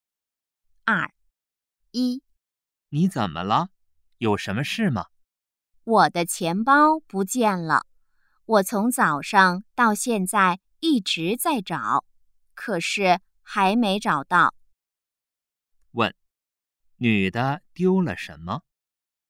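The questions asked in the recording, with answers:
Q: 问,女的丢了什么?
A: 钱包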